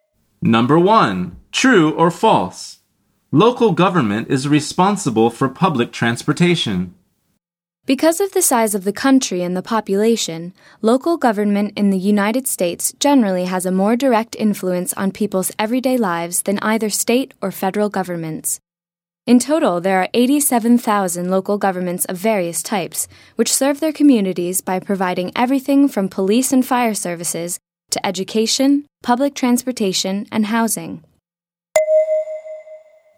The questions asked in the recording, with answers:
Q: True or false? Local government is responsible for public transportation.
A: The answer is true.